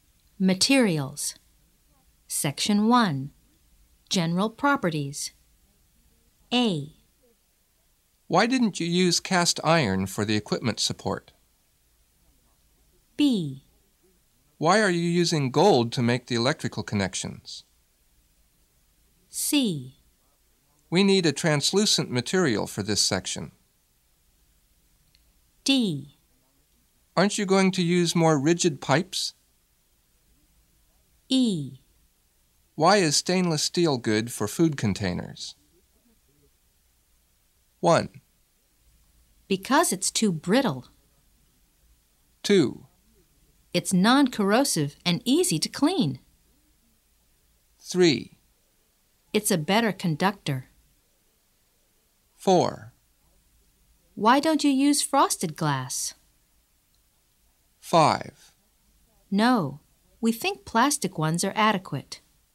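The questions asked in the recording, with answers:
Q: Because it's too brittle.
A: A: Why didn't you use cast iron for the equipment support?

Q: It's non-corrosive and easy to clean.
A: E: Why is stainless steel good for food containers?

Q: It's a better conductor.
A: B: Why are you using gold to make the electrical connections?

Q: Why don't you use frosted glass?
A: C: We need a translucent material for this section.

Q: No, we think plastic ones are adequate.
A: D: Aren't you going to use more rigid pipes?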